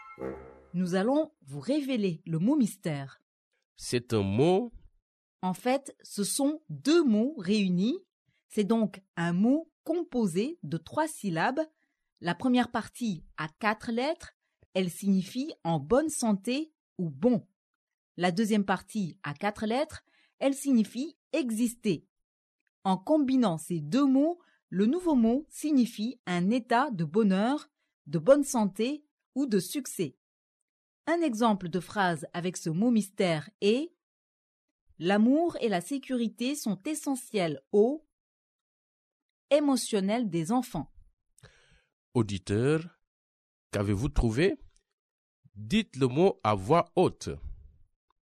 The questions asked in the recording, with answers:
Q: Auditeur, qu'avez-vous trouvé?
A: Le mot mystère d'aujourd'hui est « bien-être ».